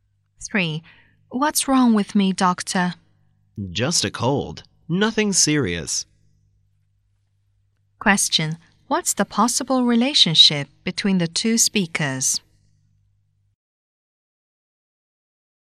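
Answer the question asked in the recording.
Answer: Doctor and patient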